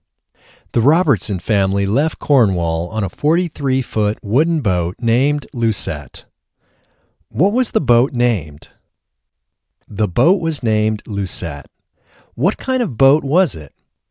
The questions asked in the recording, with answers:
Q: What kind of boat was it?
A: It was a 43-foot wooden boat.